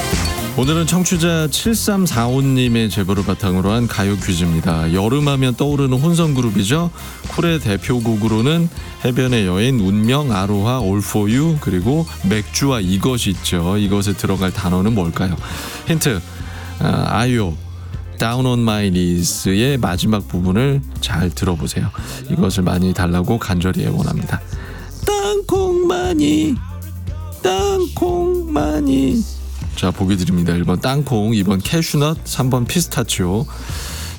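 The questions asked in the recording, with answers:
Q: 이것에 들어갈 단어는 뭘까요?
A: 1: 땅콩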